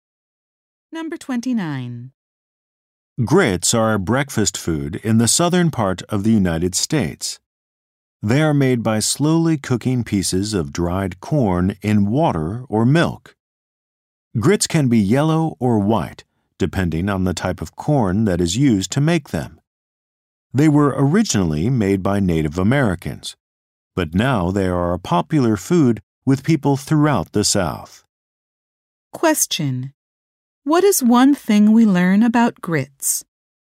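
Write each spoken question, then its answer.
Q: What is one thing we learn about grits?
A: They are made from dried corn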